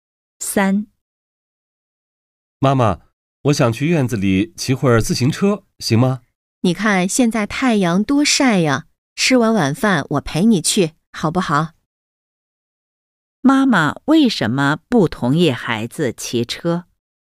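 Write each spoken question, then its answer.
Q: 妈妈为什么不同意孩子骑车?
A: 现在太阳太晒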